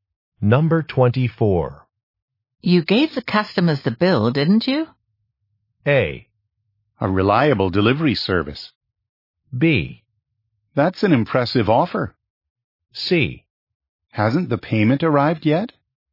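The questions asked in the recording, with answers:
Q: You gave the customers the bill, didn't you?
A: C: Hasn't the payment arrived yet?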